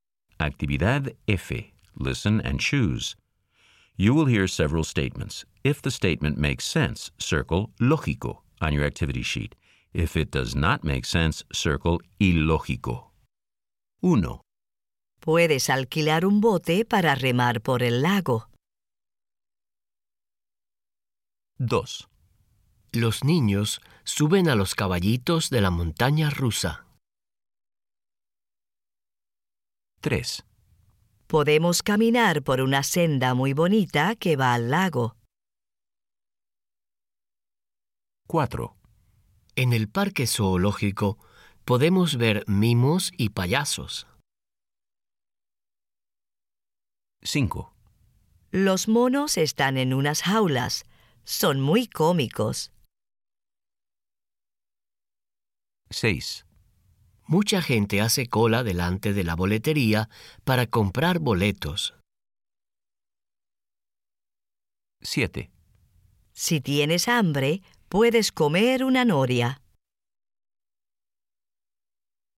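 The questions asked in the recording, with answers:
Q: Puedes alquilar un bote para remar por el lago.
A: lógico

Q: Los niños suben a los caballitos de la montaña rusa.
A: ilógico

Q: Podemos caminar por una senda muy bonita que va al lago.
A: lógico

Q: En el parque zoológico podemos ver mimos y payasos.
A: ilógico

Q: Los monos están en unas jaulas. Son muy cómicos.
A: lógico

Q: Mucha gente hace cola delante de la boletería para comprar boletos.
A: lógico

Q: Si tienes hambre, puedes comer una noria.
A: ilógico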